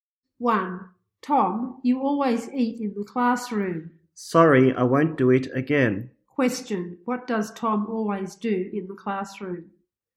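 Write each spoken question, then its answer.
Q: Question, what does Tom always do in the classroom?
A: He eats in the classroom.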